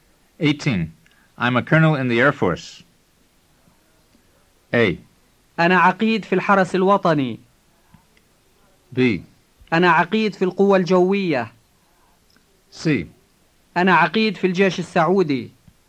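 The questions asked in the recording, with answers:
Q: I'm a colonel in the Air Force.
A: B: أنا عقيد في القوة الجوية.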